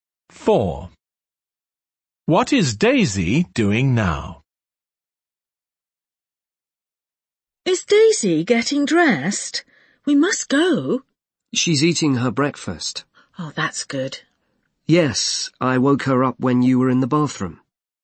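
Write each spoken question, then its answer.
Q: What is Daisy doing now?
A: Eating her breakfast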